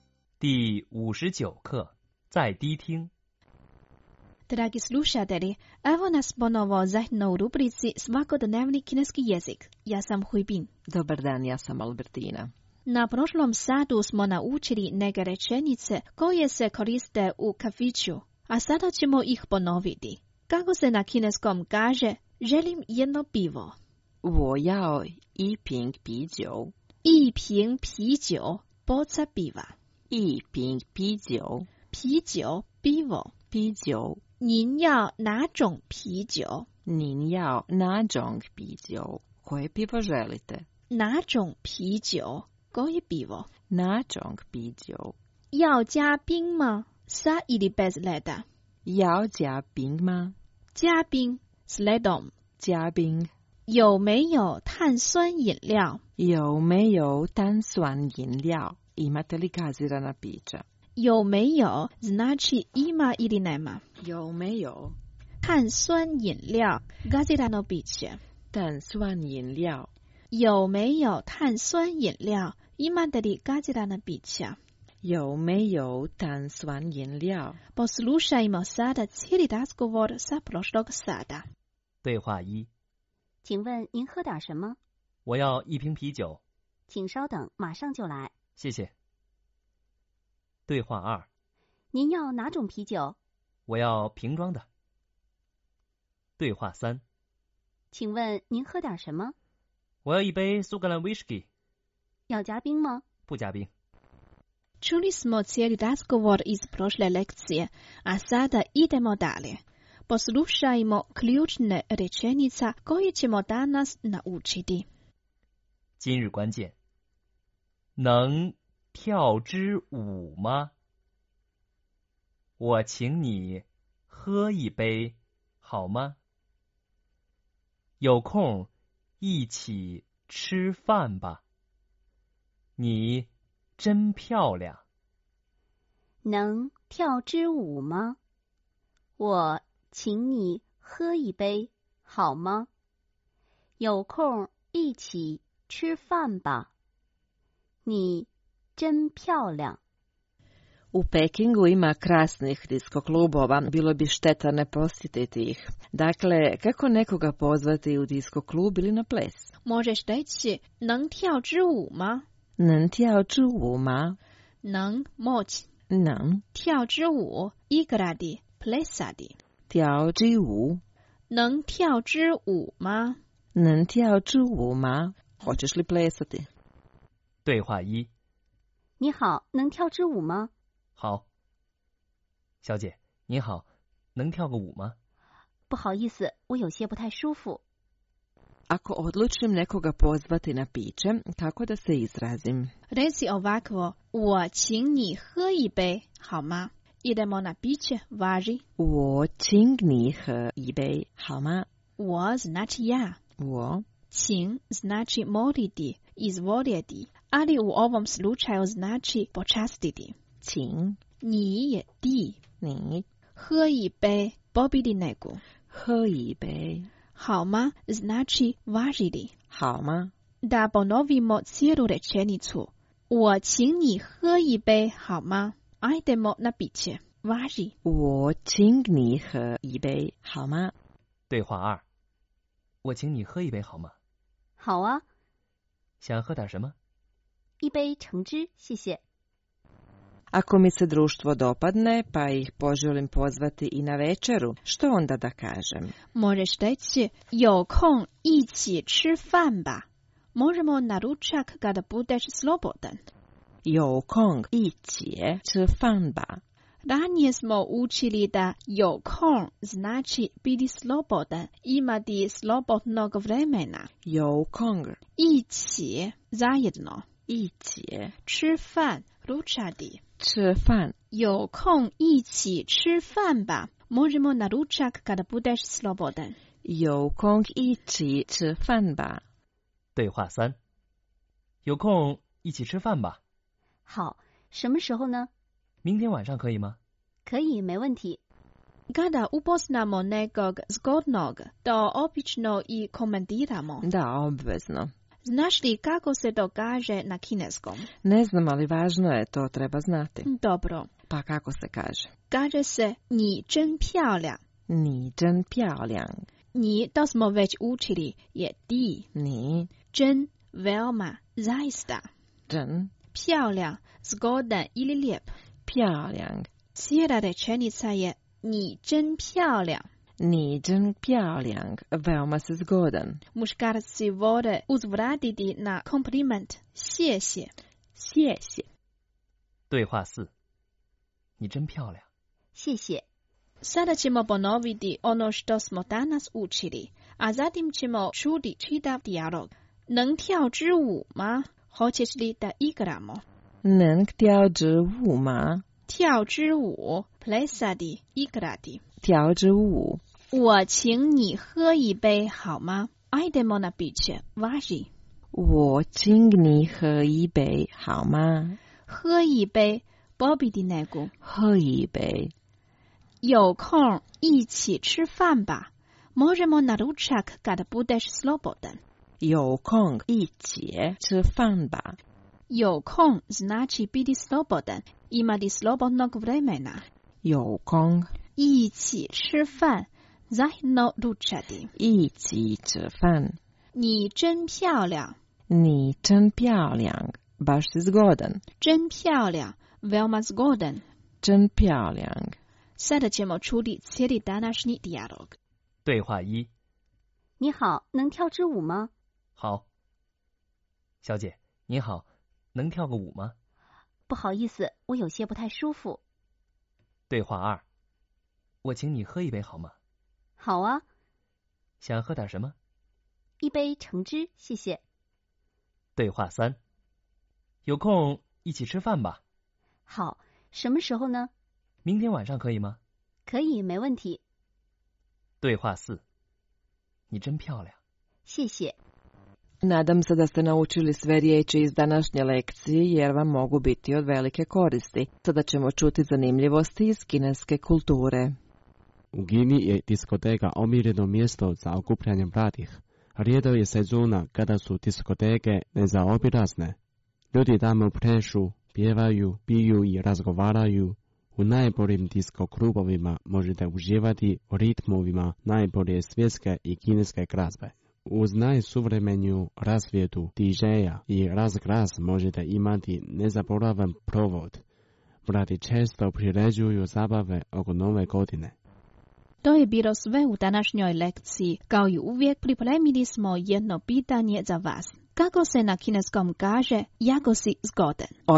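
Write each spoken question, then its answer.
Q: Kako se na kineskom kaže, jako si zgodan?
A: 你真漂亮 (Ni zhen piao liang)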